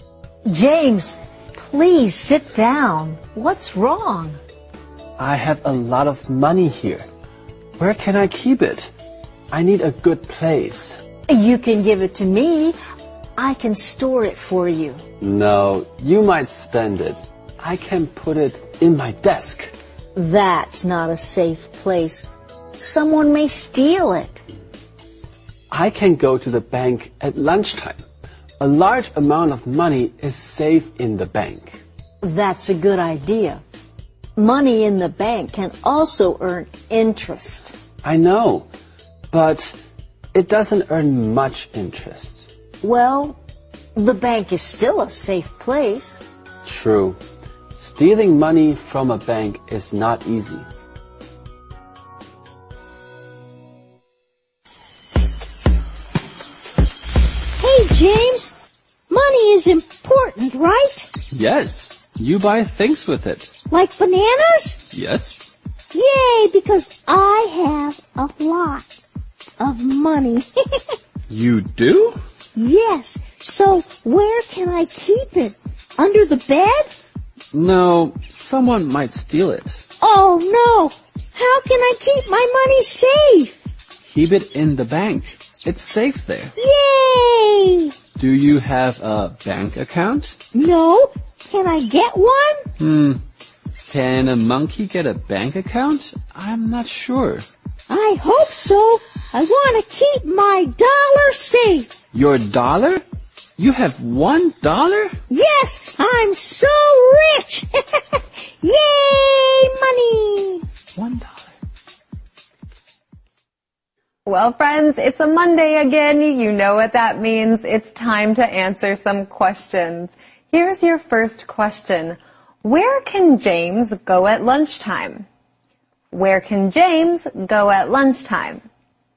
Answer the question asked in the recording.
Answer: He can go to the bank.